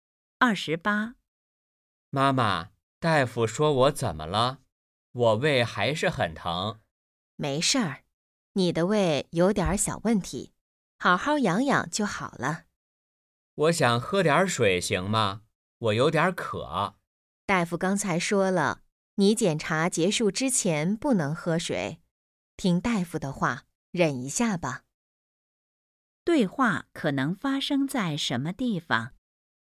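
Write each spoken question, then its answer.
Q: 对话可能发生在什么地方?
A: 医院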